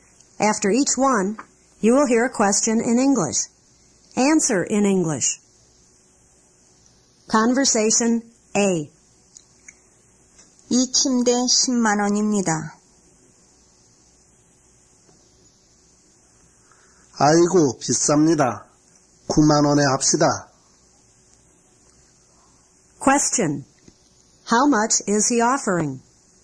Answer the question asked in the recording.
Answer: 90,000 won.